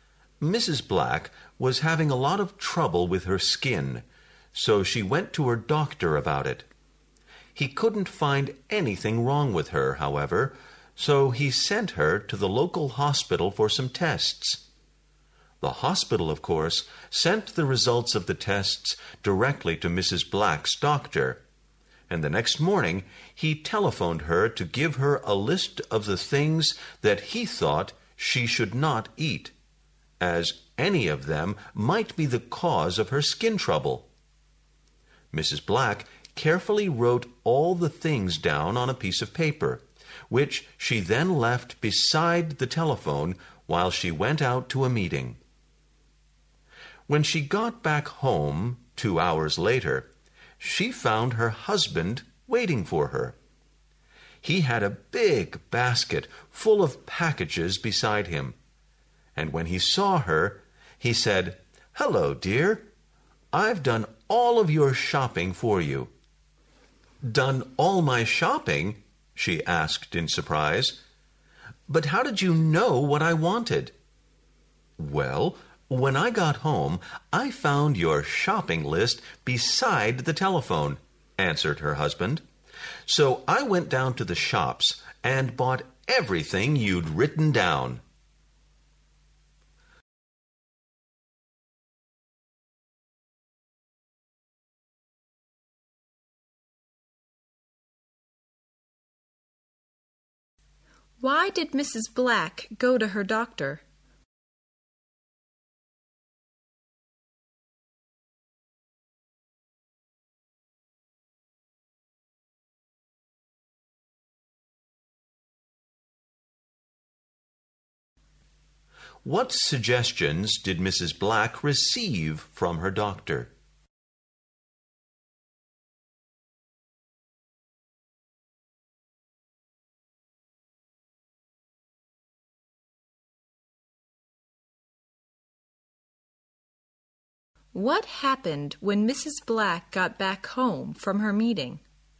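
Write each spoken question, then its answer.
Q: Why did Mrs. Black go to her doctor?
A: She was having a lot of trouble with her skin.

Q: What suggestions did Mrs. Black receive from her doctor?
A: A list of things she should not eat, as they might cause her skin trouble.

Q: What happened when Mrs. Black got back home from her meeting?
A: Her husband had bought all the foods on the list, thinking it was her shopping list.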